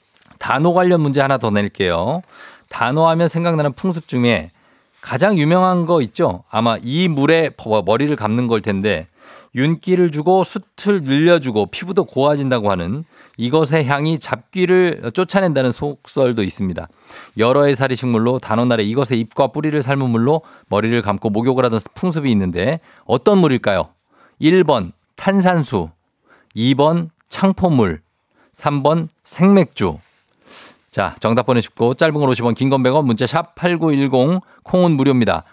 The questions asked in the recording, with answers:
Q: 여러 해살이 식물로 단오날에 이것의 잎과 뿌리를 삶은 물로 머리를 감고 목욕을 하던 풍습이 있는데 어떤 물일까요?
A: 정답은 바로 단호의 창포물로 머리를 감죠. 창포물.